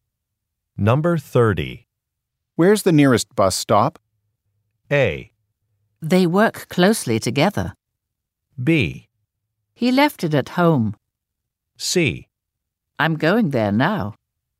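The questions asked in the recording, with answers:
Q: Where's the nearest bus stop?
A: C: I'm going there now.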